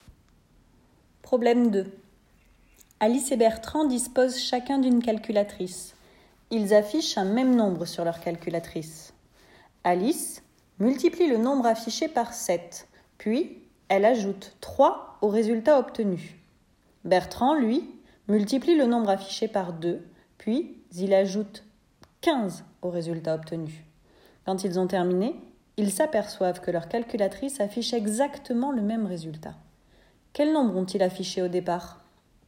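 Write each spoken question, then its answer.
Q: Quel nombre ont-ils affiché au départ ?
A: 2,4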